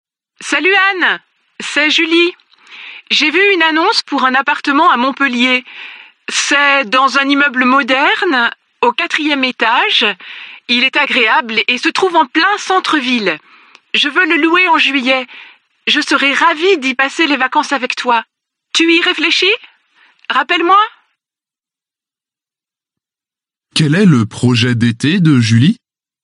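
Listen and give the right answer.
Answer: Louer un appartement à Montpellier en juillet pour passer les vacances avec Anne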